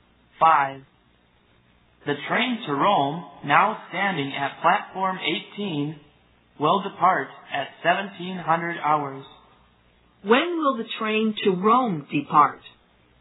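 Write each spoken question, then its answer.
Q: When will the train to Rome depart?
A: At 1700 hours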